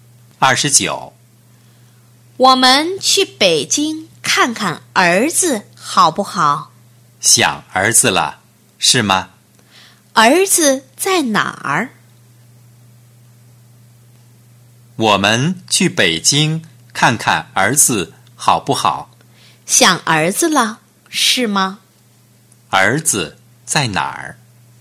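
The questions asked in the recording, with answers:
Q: 儿子在哪儿?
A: 北京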